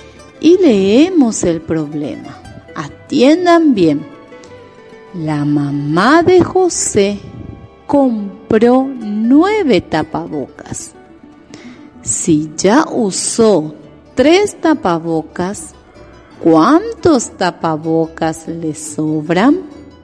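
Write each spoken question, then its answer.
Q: Si ya usó 3 tapabocas, ¿cuántos tapabocas le sobran?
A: 6 tapabocas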